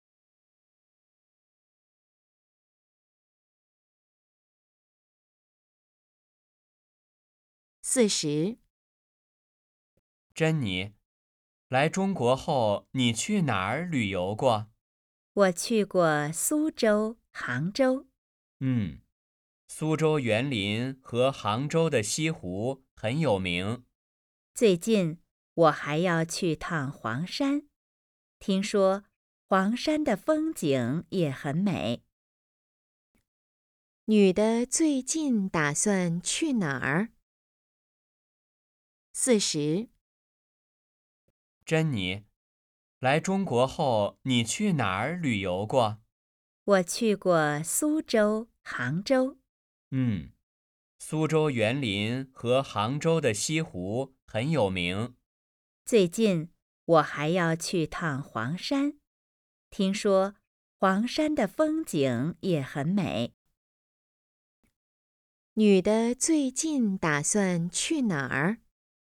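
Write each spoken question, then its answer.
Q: 女的最近打算去哪儿?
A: 黄山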